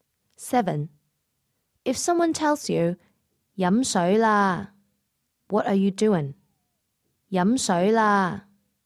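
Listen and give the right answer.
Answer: Drinking water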